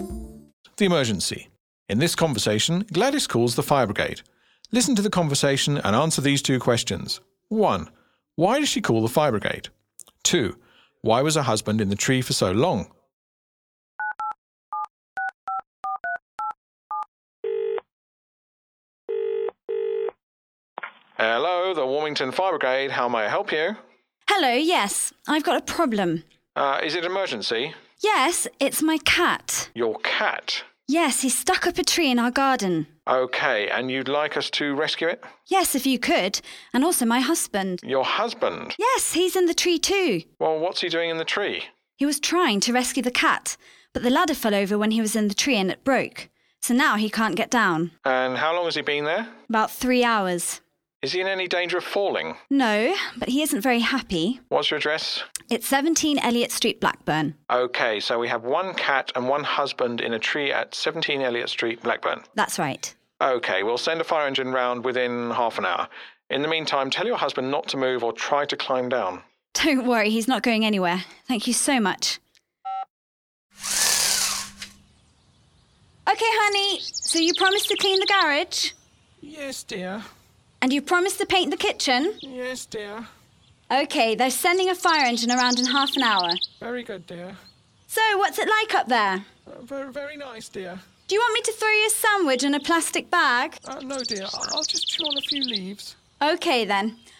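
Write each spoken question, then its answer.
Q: Why does she call the fire brigade?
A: Her cat and her husband are stuck up a tree in the garden.

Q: Why was her husband in the tree for so long?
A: The ladder fell over and broke, so he couldn't get down.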